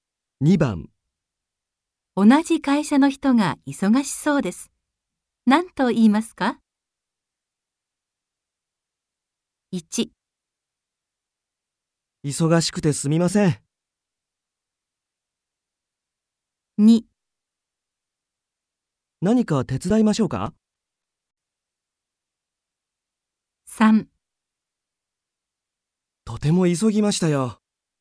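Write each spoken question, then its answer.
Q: 同じ会社の人が忙しそうです。何と言いますか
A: 2: 何か手伝いましょうか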